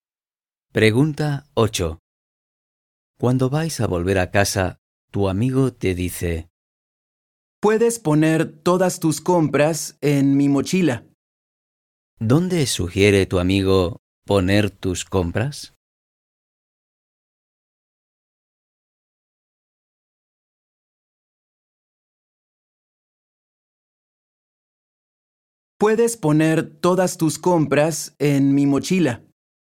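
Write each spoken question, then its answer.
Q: ¿Dónde sugiere tu amigo poner tus compras?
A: en su mochila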